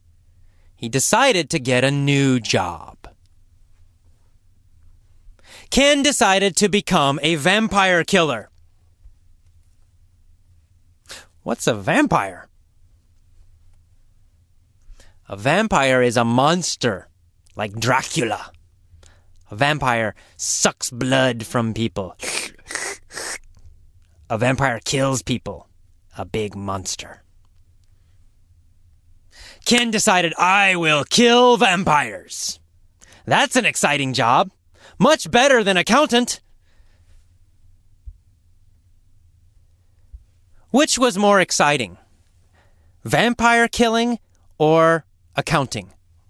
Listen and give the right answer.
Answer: Well, of course, vampire killing.